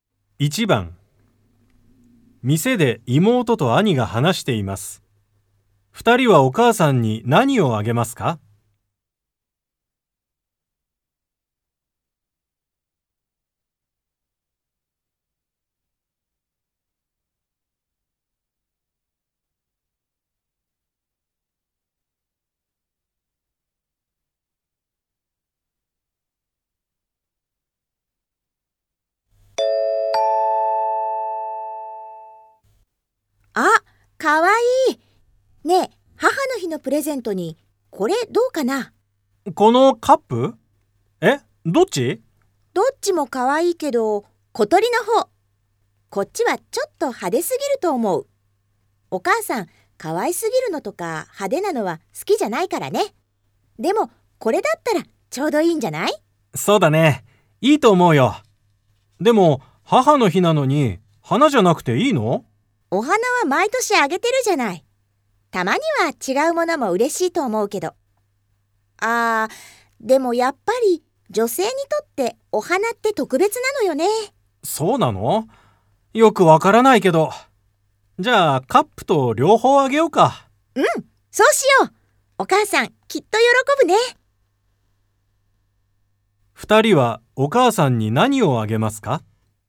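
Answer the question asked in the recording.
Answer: 小鳥のカップと花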